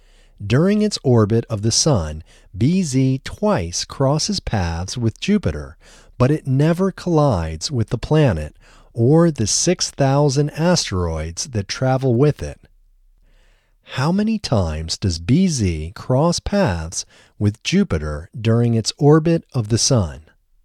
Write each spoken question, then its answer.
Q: How many times does BZ cross paths with Jupiter during its orbit of the Sun?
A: BZ crosses paths with Jupiter twice during its orbit of the Sun.